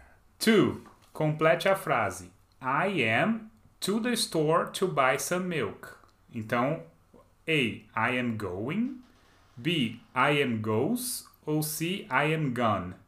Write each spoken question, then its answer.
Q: Complete a frase. I am to the store to buy some milk.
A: Só pode ser A. Ah, I am going to the store to buy some milk.